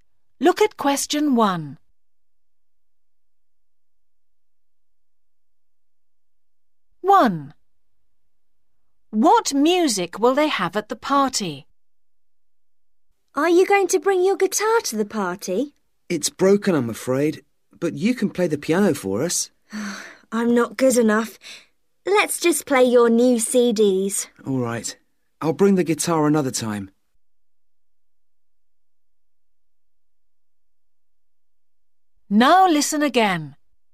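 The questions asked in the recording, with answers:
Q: What music will they have at the party?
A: CDs (the new CDs)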